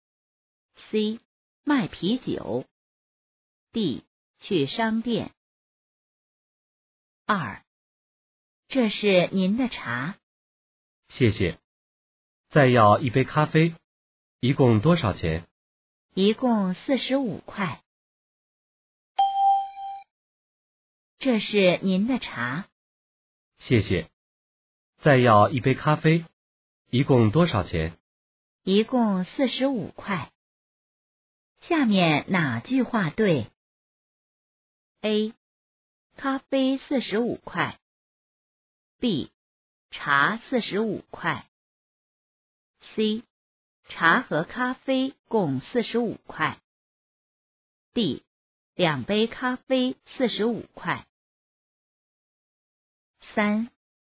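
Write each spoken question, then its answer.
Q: 下面哪句话对?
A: C: 茶和咖啡共45块。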